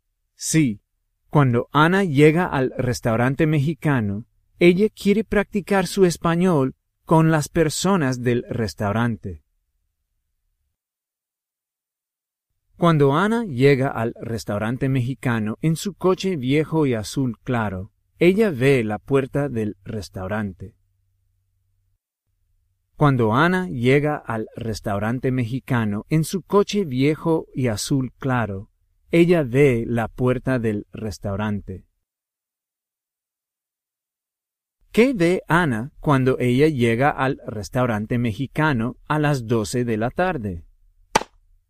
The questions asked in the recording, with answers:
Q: ¿Qué ve Ana cuando ella llega al restaurante mexicano a las 12 de la tarde?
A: Ella ve la puerta del restaurante.